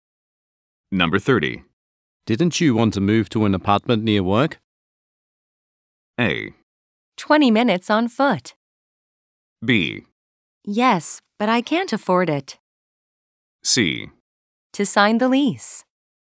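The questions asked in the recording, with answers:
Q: Didn't you want to move to an apartment near work?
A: B: Yes, but I can't afford it.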